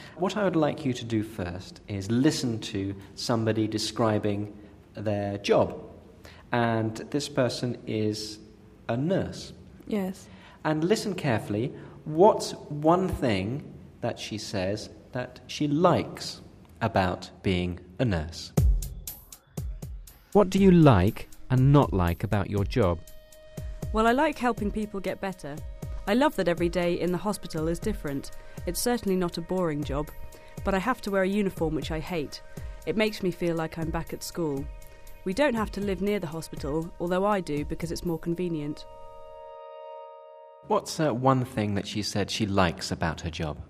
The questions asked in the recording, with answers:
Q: What's one thing that she said she likes about her job?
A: She likes helping people get better.